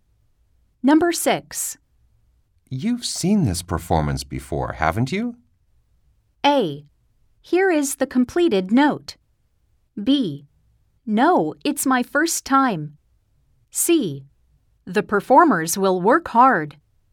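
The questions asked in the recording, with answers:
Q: You've seen this performance before, haven't you?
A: B: No, it's my first time.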